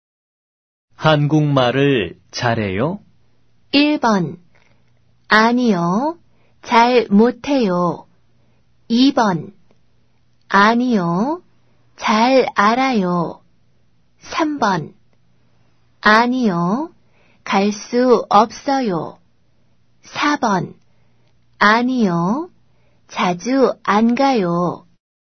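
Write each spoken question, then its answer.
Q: 한국말을 잘해요?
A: 1: 아니요. 잘 못해요.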